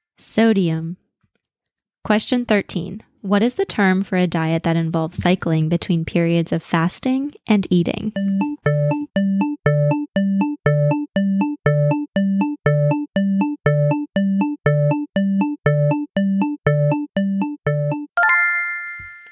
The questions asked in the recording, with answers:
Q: What is the term for a diet that involves cycling between periods of fasting and eating?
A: Intermittent fasting.